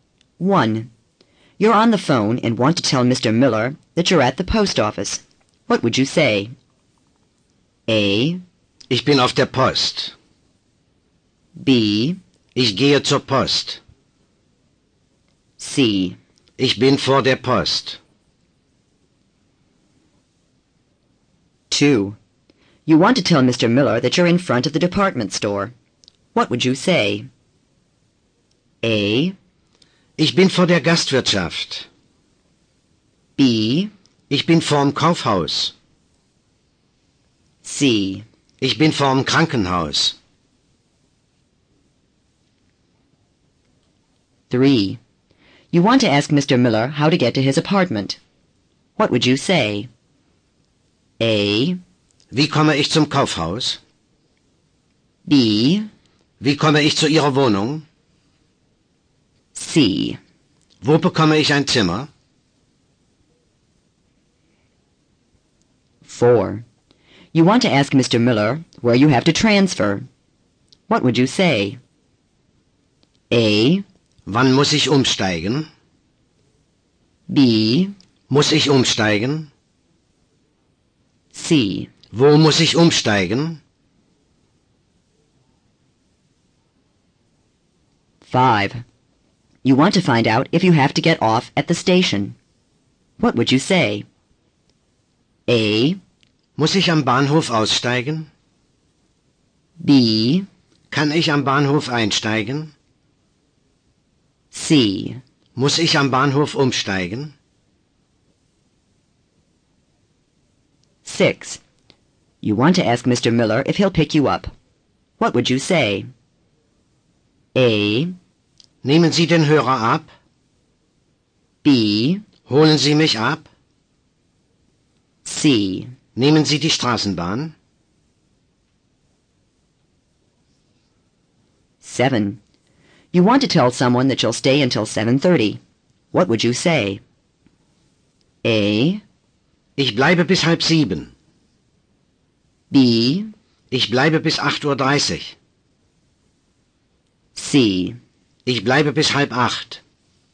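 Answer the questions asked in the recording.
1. A: Ich bin auf der Post.
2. B: Ich bin vorm Kaufhaus.
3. B: Wie komme ich zu Ihrer Wohnung?
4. C: Wo muss ich umsteigen?
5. A: Muss ich am Bahnhof aussteigen?
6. B: Holen Sie mich ab?
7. C: Ich bleibe bis 7:30.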